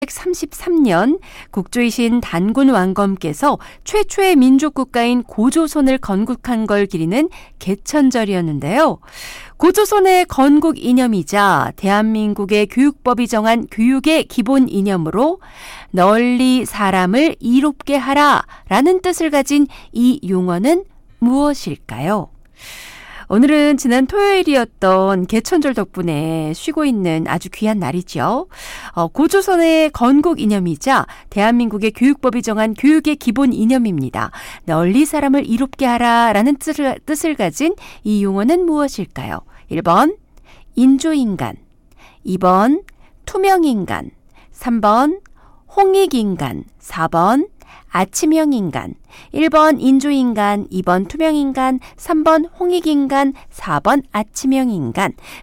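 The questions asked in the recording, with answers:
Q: 널리 사람을 이롭게 하라라는 뜻을 가진 이 용어는 무엇일까요?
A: 3: 홍익인간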